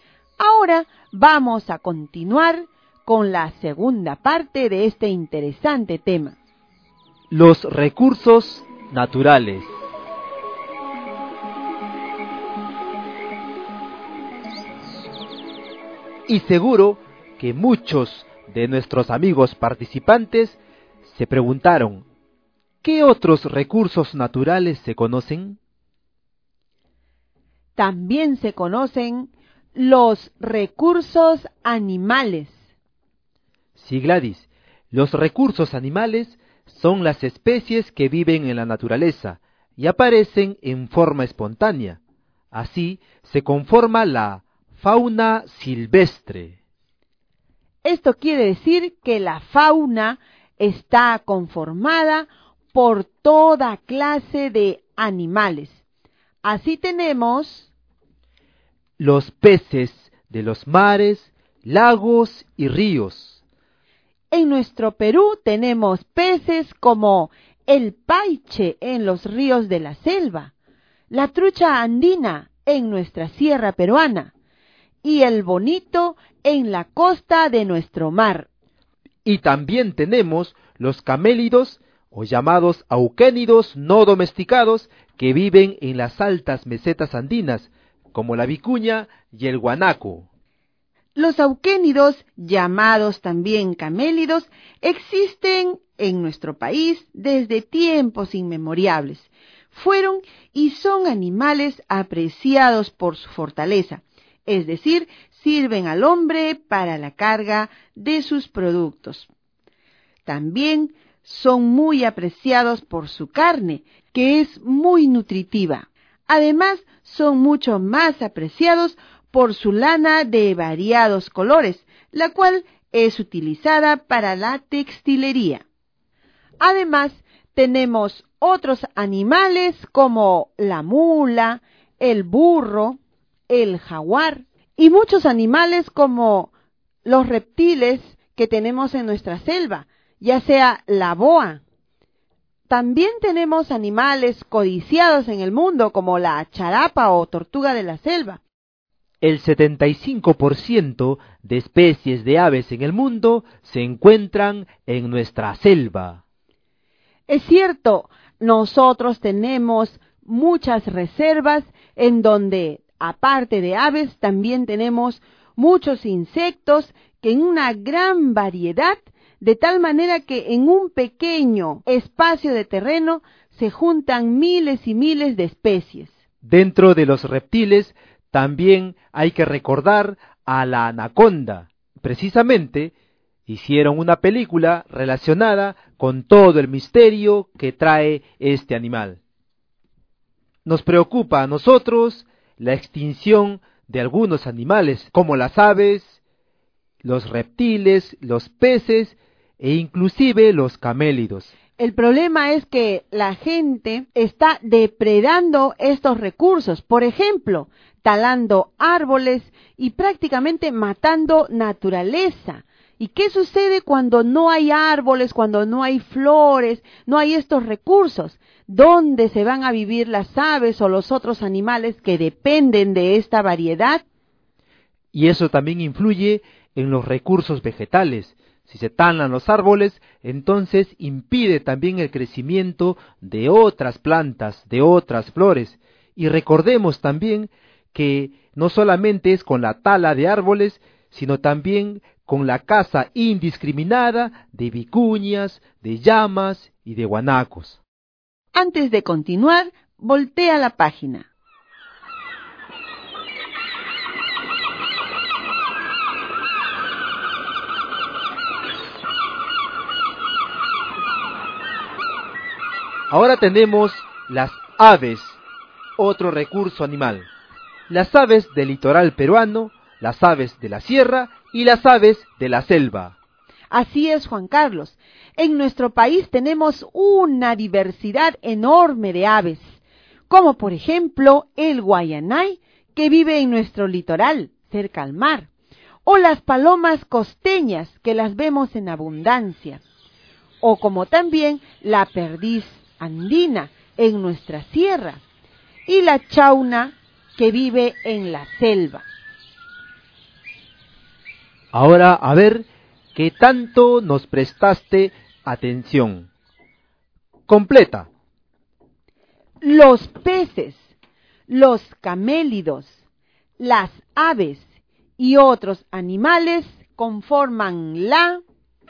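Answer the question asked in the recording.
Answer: fauna silvestre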